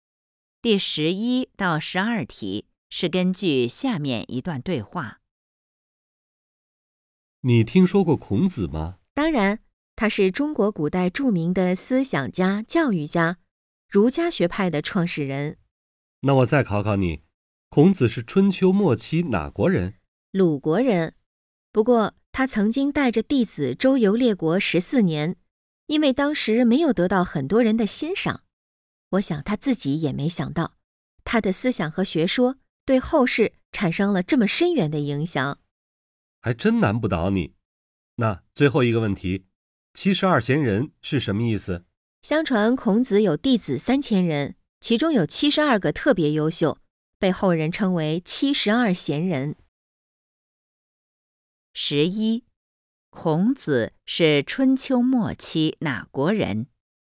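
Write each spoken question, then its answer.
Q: 孔子是春秋末期哪国人?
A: 鲁国人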